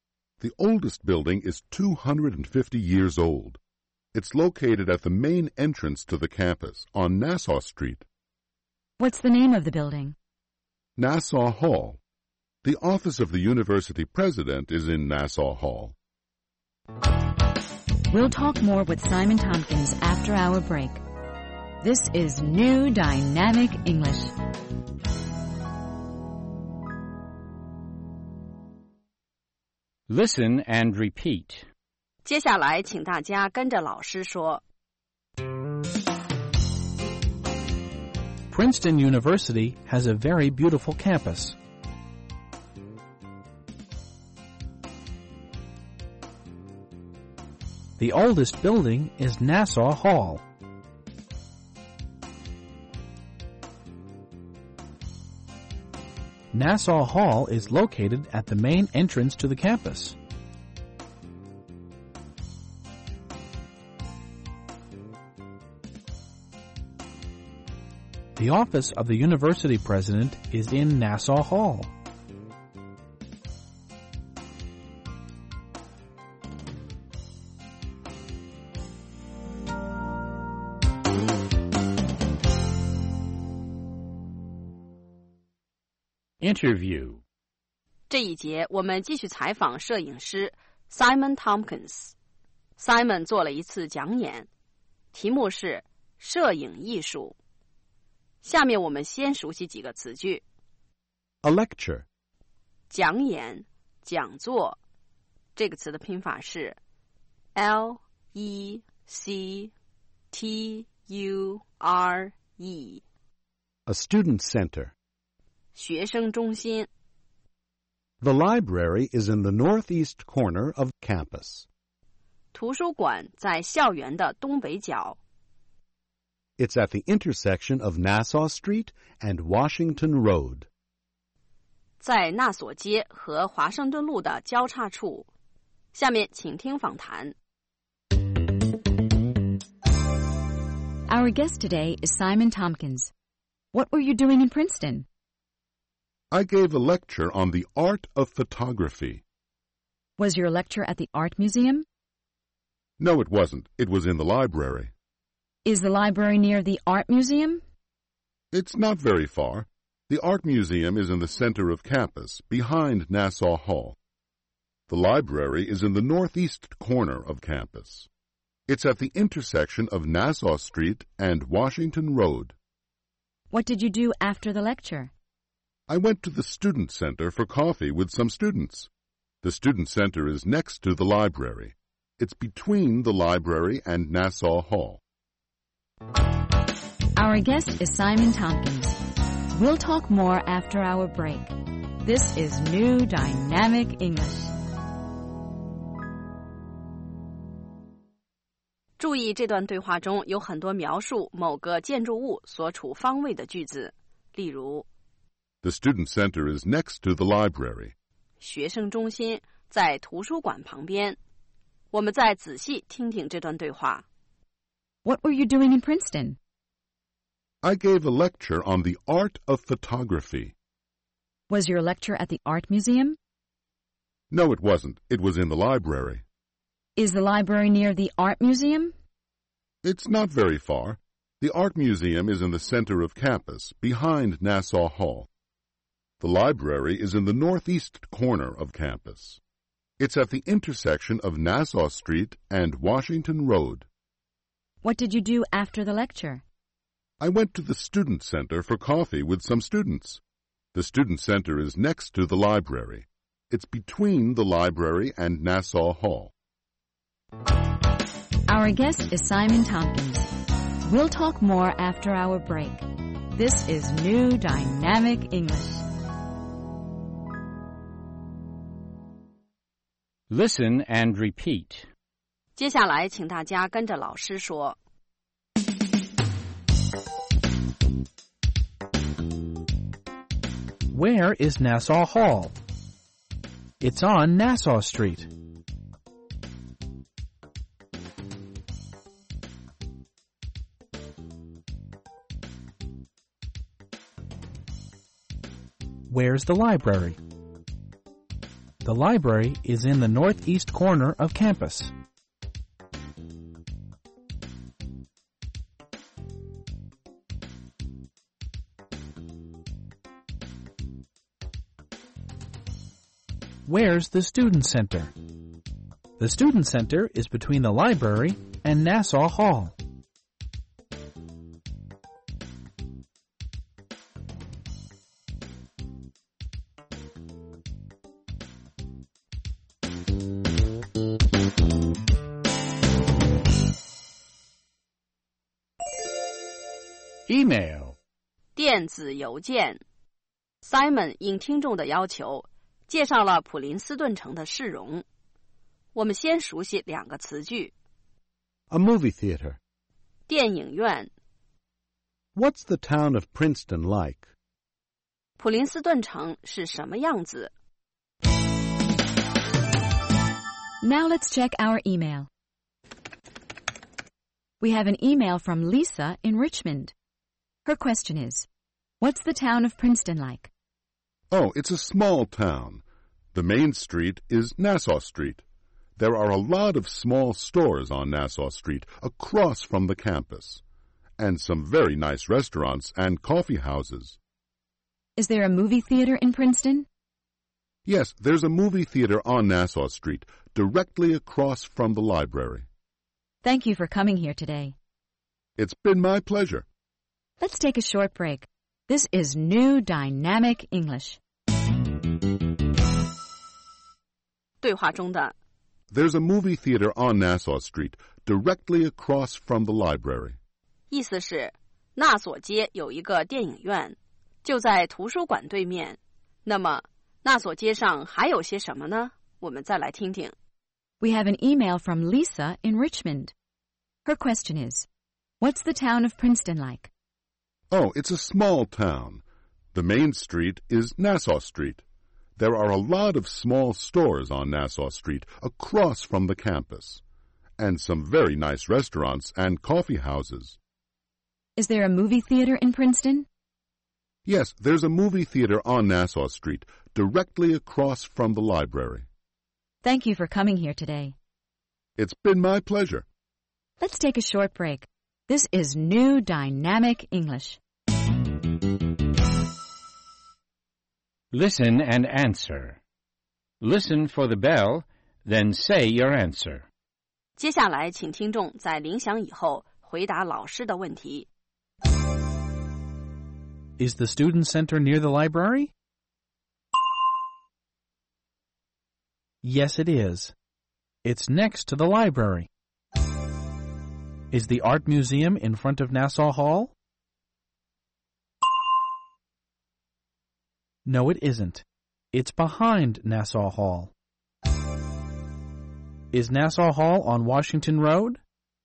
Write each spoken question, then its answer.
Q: Is the student center near the library?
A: Yes, it is. It's next to the library.